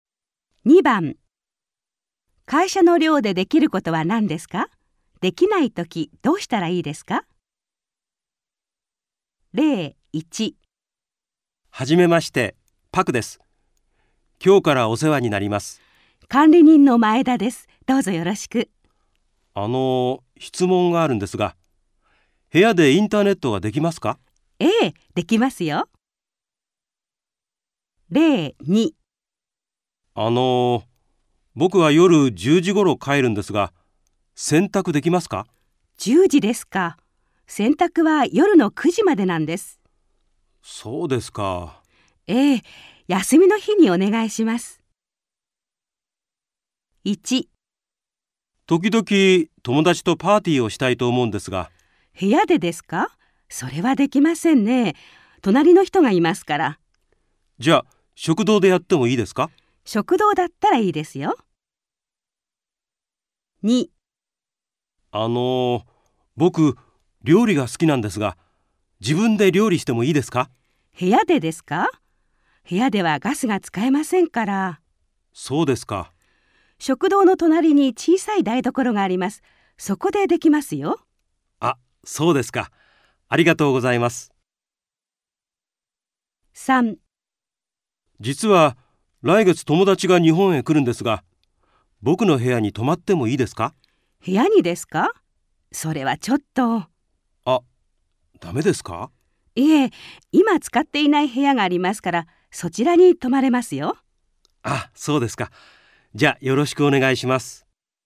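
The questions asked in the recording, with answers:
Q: 会社の寮でできることは何ですか?できないときどうしたらいいですか?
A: 部屋でパーティーはできない。食堂ならできる。

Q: 会社の寮でできることは何ですか?できないときどうしたらいいですか?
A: 部屋で料理はできない(ガスが使えない)。食堂の隣の小さい台所でできる。

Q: 会社の寮でできることは何ですか?できないときどうしたらいいですか?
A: 友達は自分の部屋に泊まれない。今使っていない部屋に泊まれる。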